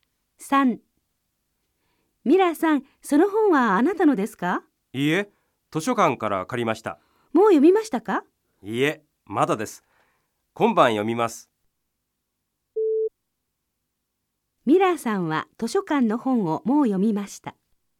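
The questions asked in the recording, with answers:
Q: ミラーさんは図書館の本をもう読みました。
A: ×(いいえ、まだです)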